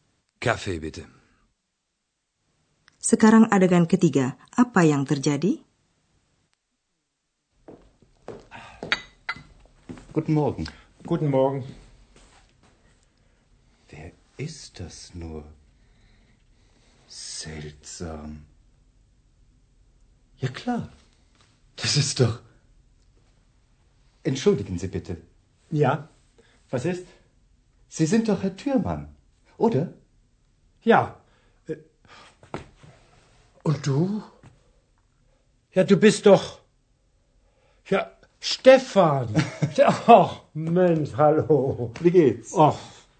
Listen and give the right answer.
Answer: Ini kedengarannya Dr. Turman kebetulan bertemu dengan teman karib setelah beberapa lama tidak berjumpa.